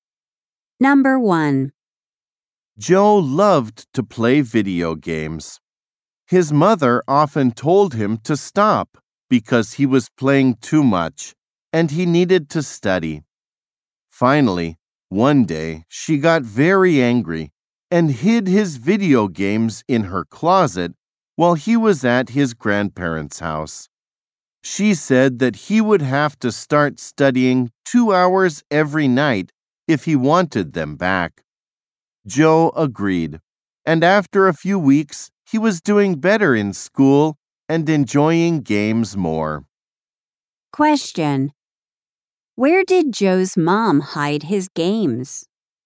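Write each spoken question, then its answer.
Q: Where did Joe's mom hide his games?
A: In her closet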